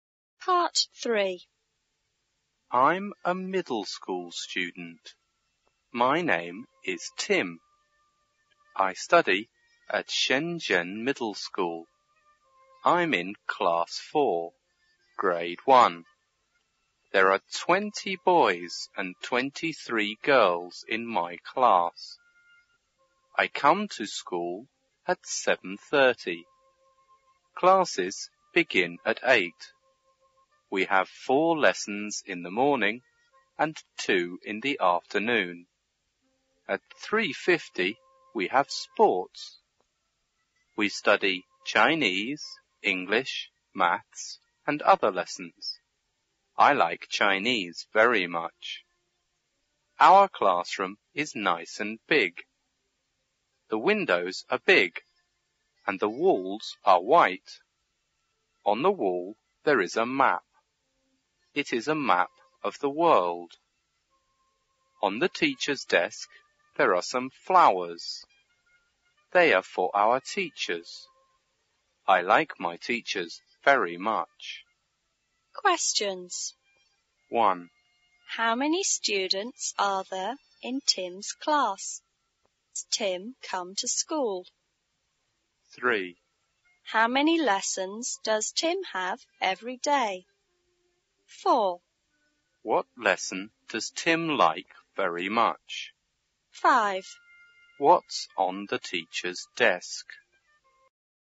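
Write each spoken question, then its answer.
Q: How many students are there in Tim's class?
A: 43 (20 boys and 23 girls)

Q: How many lessons does Tim have every day?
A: Six

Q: What lesson does Tim like very much?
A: Chinese

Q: What's on the teacher's desk?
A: Some flowers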